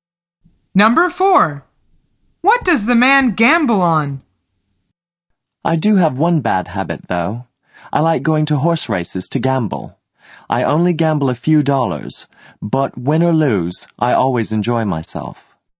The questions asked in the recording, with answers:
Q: What does the man gamble on?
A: The answer is horses.